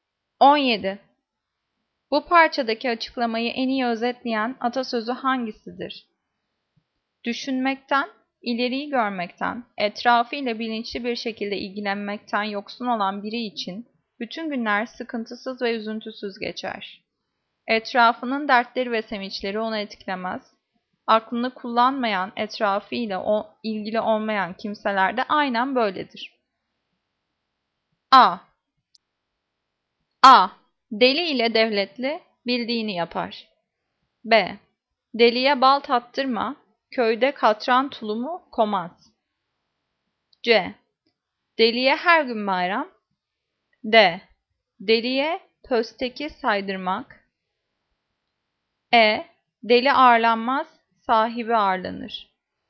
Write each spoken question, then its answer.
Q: Bu parçadaki açıklamayı en iyi özetleyen atasözü hangisidir?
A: Cevap C. Deliye her gün bayram.